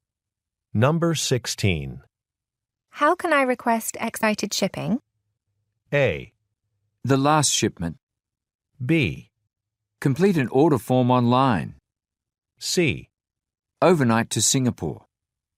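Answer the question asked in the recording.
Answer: B: Complete an order form online.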